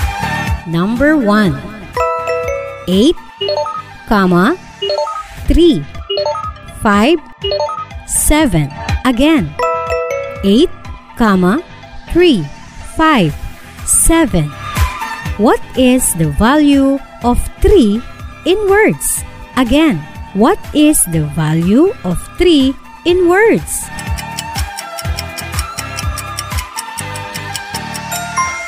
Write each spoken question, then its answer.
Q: What is the value of 3 in words?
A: Yes, you are right. It's 300.